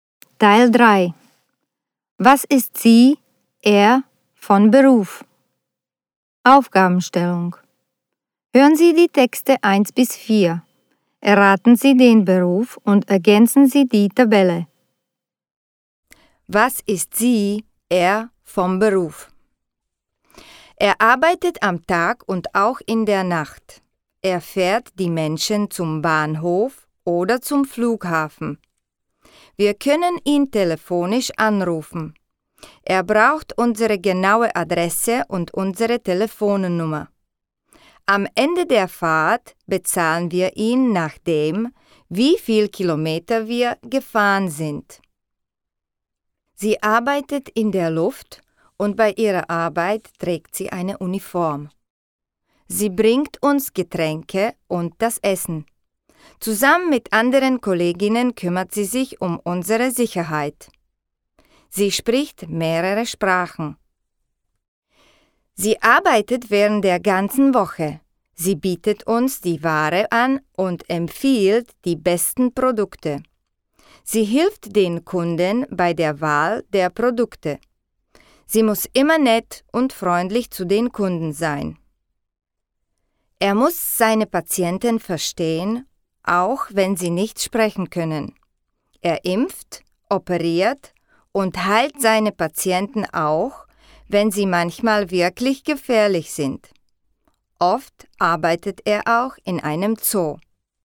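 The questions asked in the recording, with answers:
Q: Was ist sie, er, vom Beruf?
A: Taxifahrer

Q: Was ist sie, er, vom Beruf?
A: Flugbegleiterin (Stewardess)

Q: Was ist sie, er, vom Beruf?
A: Verkäuferin

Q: Was ist sie, er, vom Beruf?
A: Tierarzt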